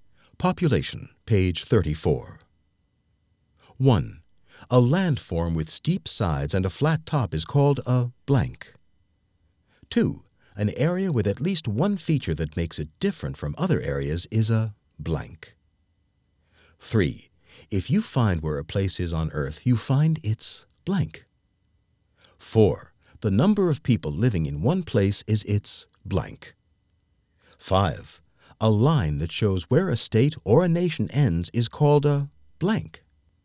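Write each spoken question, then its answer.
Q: A landform with steep sides and a flat top is called a blank.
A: plateau

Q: An area with at least one feature that makes it different from other areas is a blank.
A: region

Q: The number of people living in one place is its blank.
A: population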